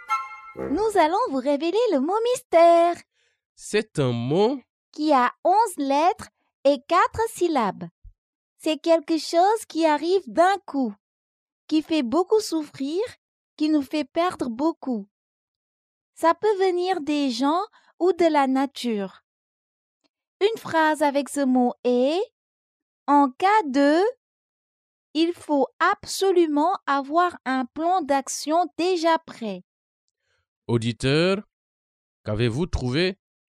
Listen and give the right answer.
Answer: Le mot mystère est catastrophe.